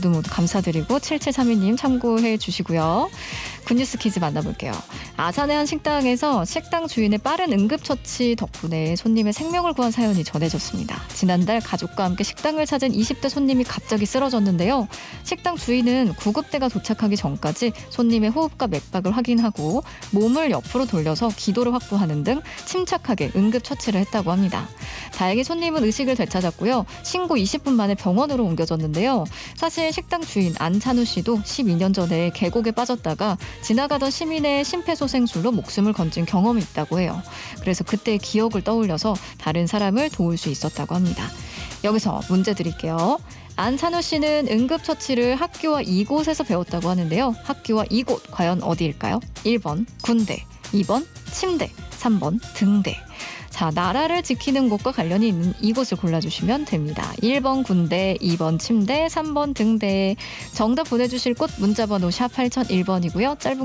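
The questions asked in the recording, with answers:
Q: 학교와 이곳 과연 어디일까요?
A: 1: 군대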